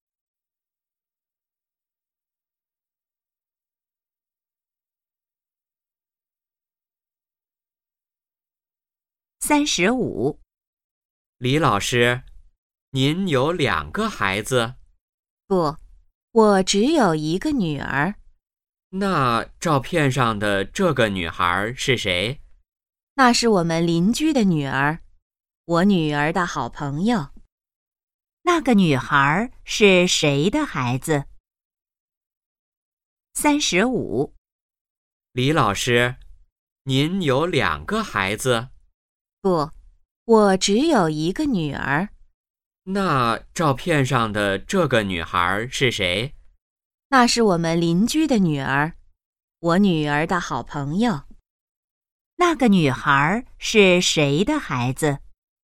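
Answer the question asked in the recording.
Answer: 邻居的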